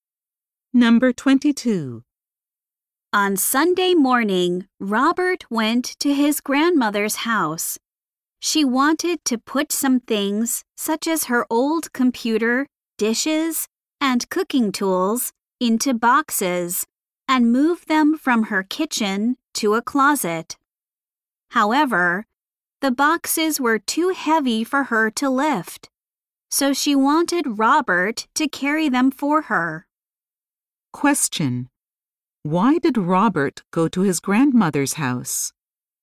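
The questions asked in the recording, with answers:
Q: Why did Robert go to his grandmother's house?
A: To carry heavy boxes for her.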